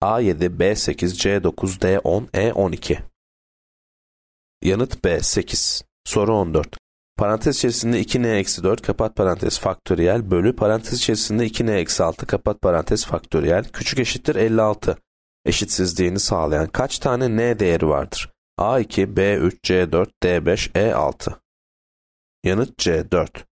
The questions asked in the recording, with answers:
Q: Eşitsizliğini sağlayan kaç tane n değeri vardır?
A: Yanıt C, 4.